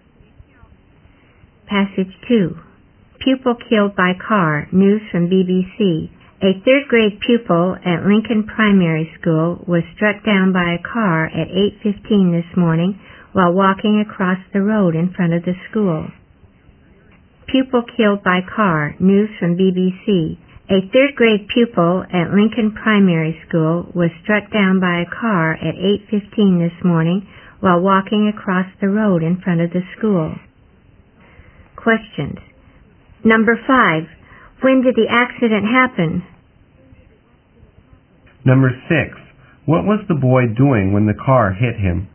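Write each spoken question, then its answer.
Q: When did the accident happen?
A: At 8:15 this morning.

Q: What was the boy doing when the car hit him?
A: Walking across the road in front of the school.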